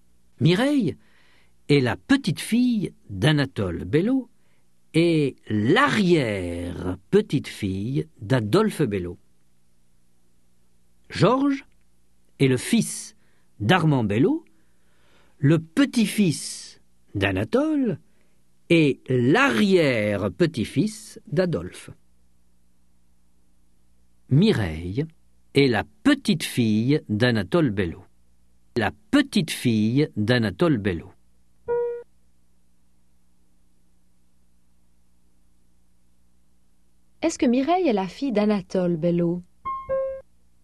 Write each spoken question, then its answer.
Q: Est-ce que Mireille est la fille d'Anatole Bello?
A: Non, c'est la petite-fille d'Anatole Bello.